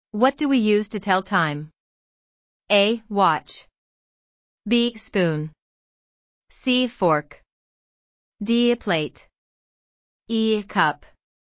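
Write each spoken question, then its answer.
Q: What do we use to tell time?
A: A: Watch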